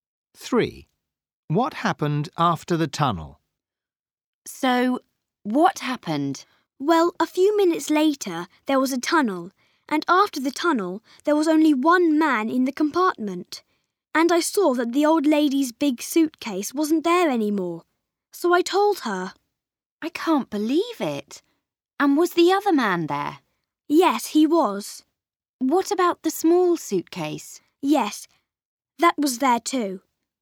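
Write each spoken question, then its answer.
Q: What happened after the tunnel?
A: Only one man was left and the old lady's big suitcase was gone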